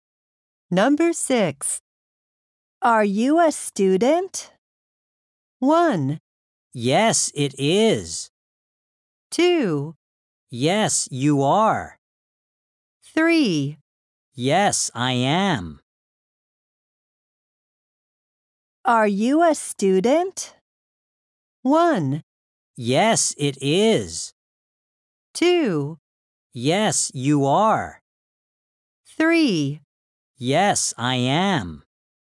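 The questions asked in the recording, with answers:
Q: Are you a student?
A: 3: Yes, I am.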